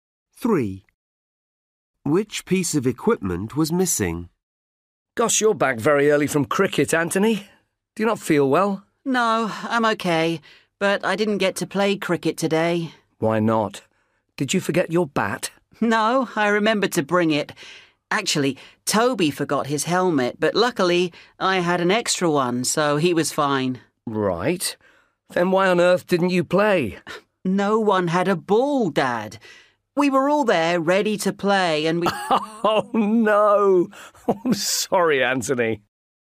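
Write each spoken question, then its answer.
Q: Which piece of equipment was missing?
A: a ball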